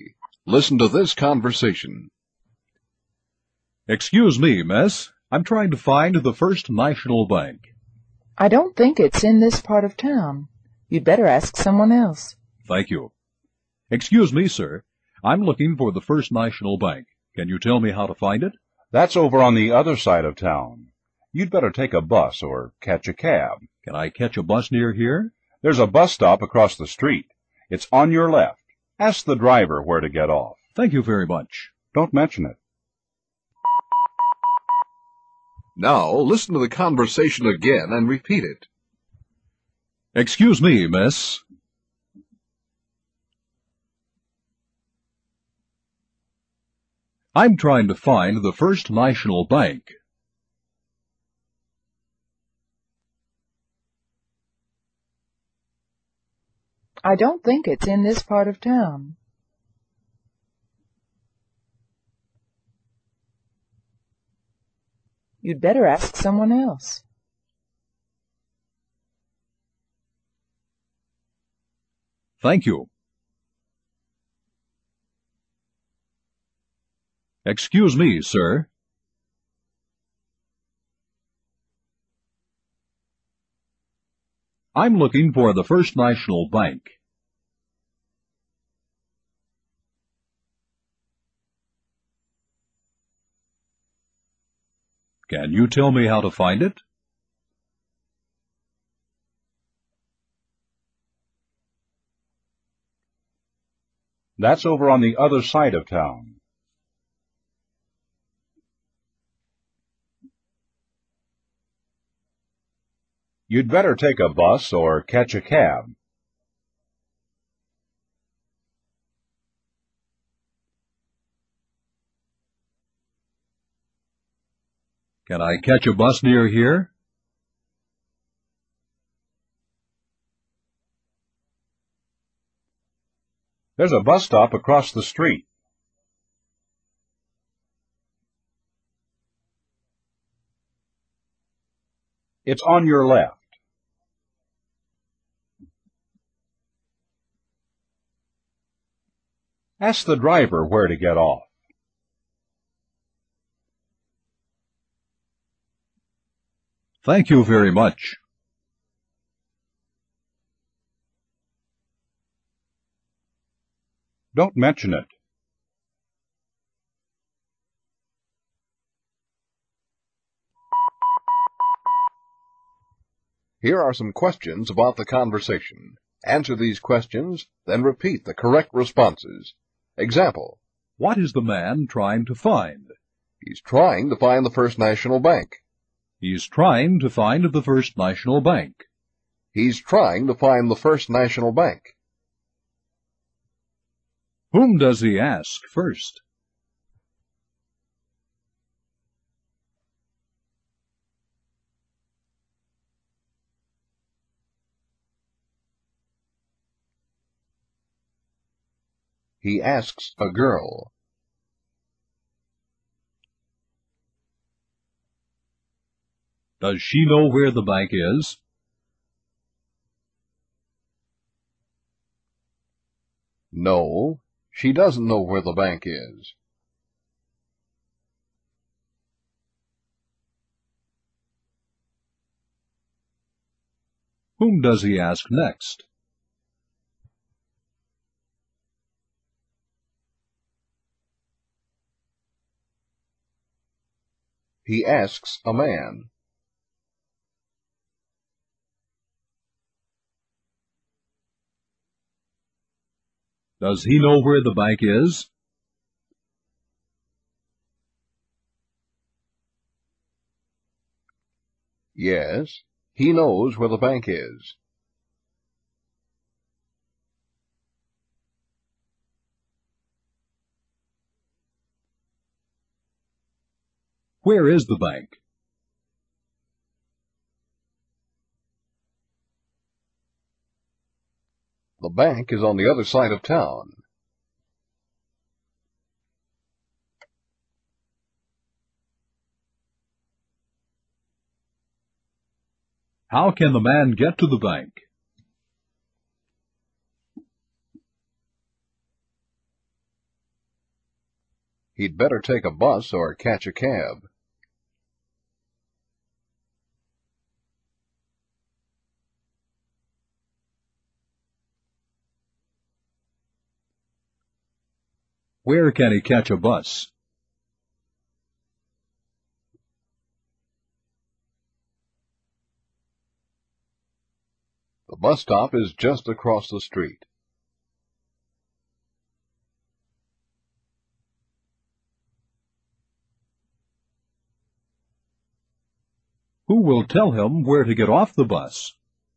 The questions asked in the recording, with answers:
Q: Whom does he ask first?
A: He asks a girl.

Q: Does she know where the bank is?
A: No, she doesn't know where the bank is.

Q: Whom does he ask next?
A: He asks a man.

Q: Does he know where the bank is?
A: Yes, he knows where the bank is.

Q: Where is the bank?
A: The bank is on the other side of town.

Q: How can the man get to the bank?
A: he'd better take a bus or catch a cab.

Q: Where can he catch a bus?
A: The bus stop is just across the street.

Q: Who will tell him where to get off the bus?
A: The bus driver will tell him where to get off.